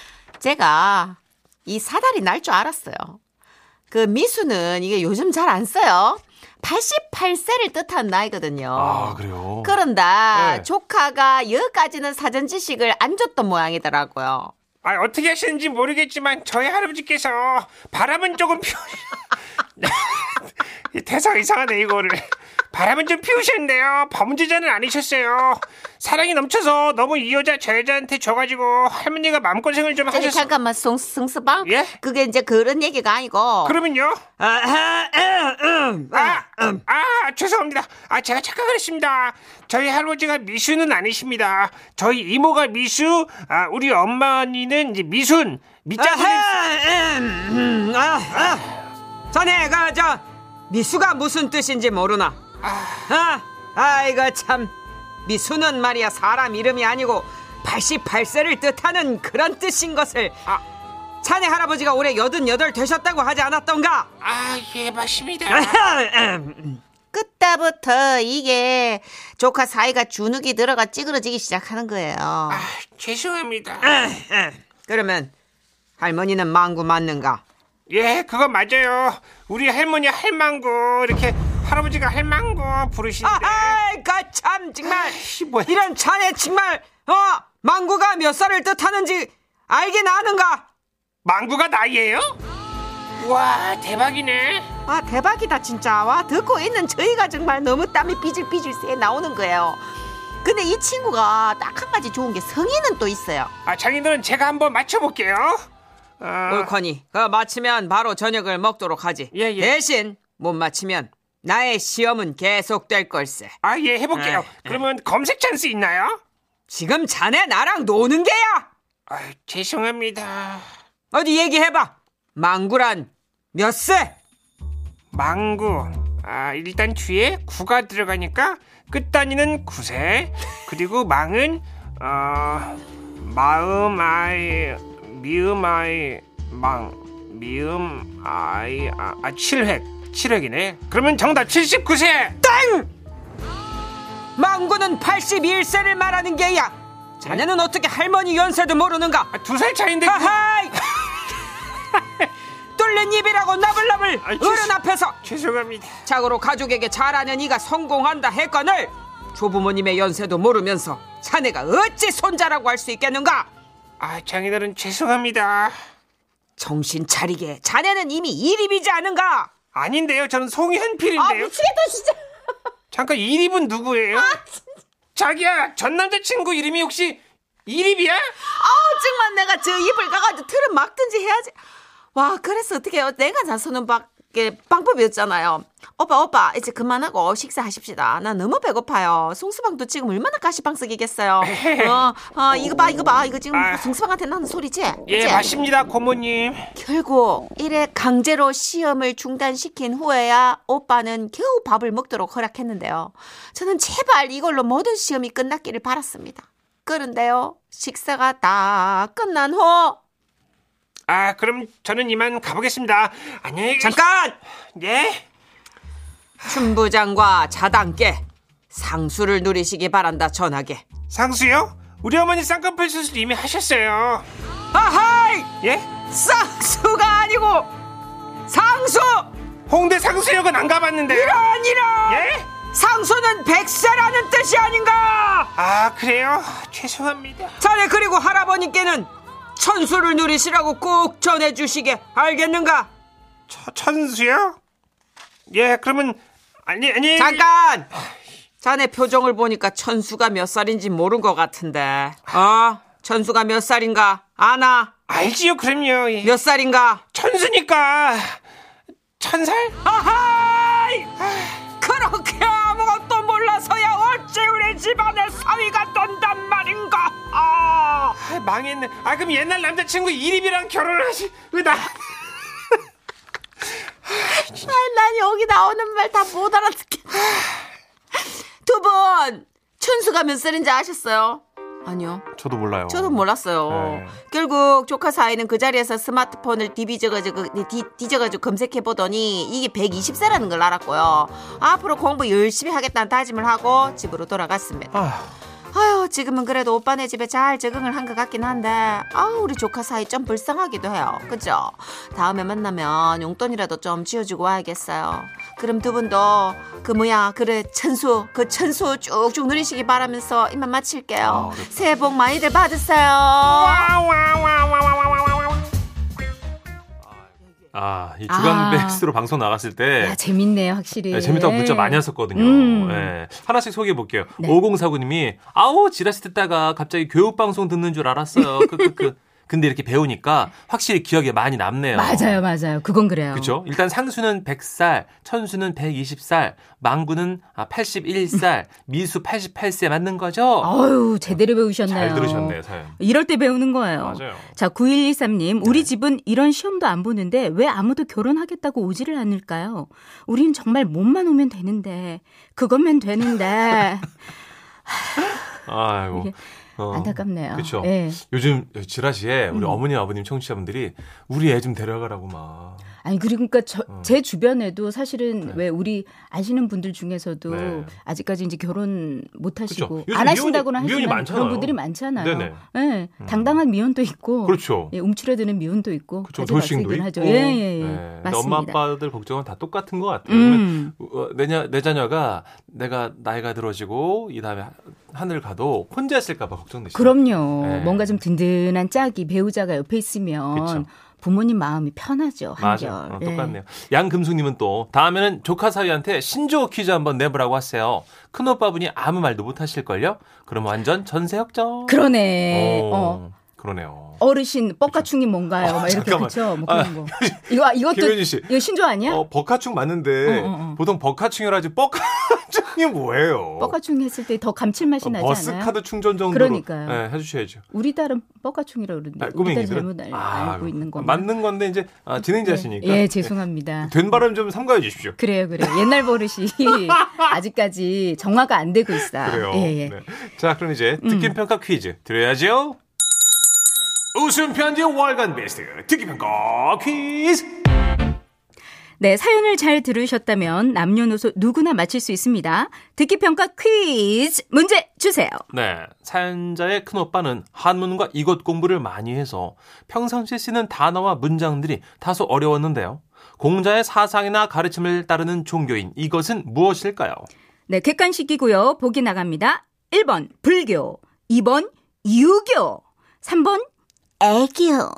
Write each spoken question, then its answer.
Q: 공자의 사상이나 가르침을 따르는 종교인 이것은 무엇일까요?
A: 정답은 2번 유교였습니다. 유교.